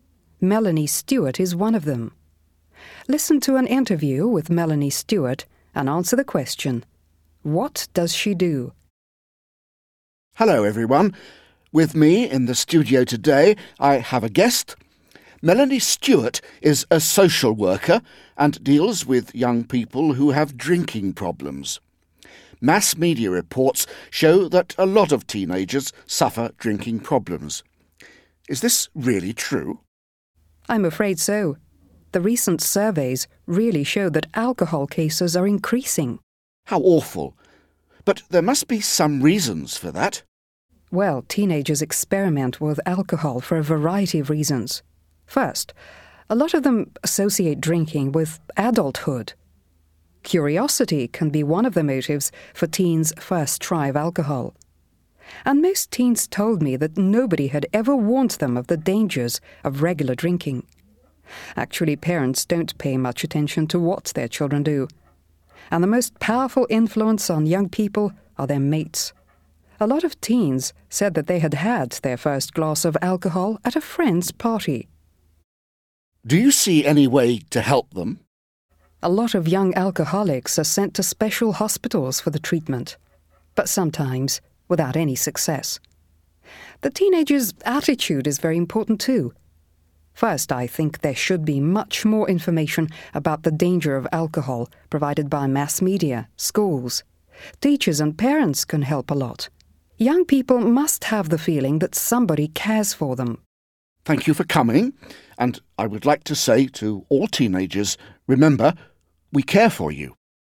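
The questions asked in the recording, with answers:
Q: what does she do?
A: She is a social worker who deals with young people who have drinking problems.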